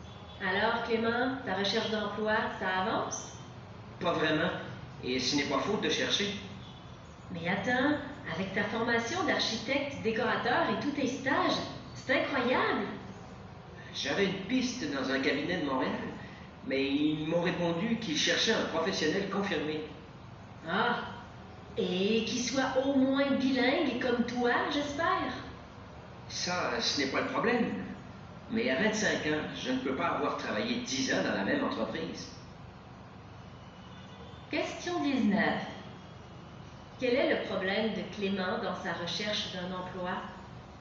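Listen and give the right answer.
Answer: Il manque d'expérience professionnelle (on cherche un professionnel confirmé).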